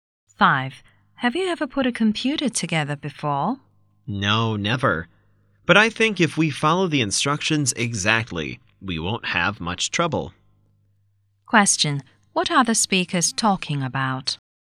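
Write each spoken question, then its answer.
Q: What are the speakers talking about?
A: Putting a computer together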